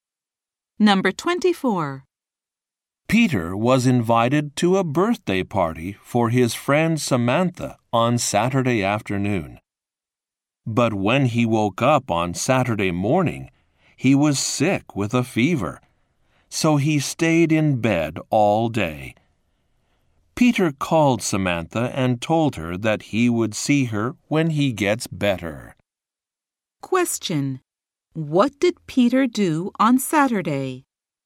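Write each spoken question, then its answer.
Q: What did Peter do on Saturday?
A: He stayed in bed all day because he was sick.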